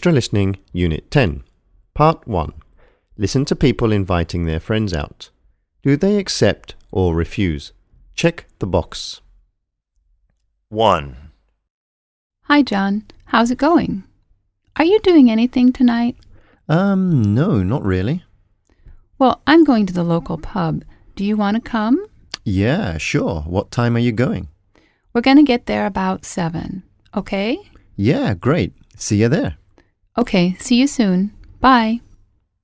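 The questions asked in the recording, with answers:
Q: Do they accept or refuse?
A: accept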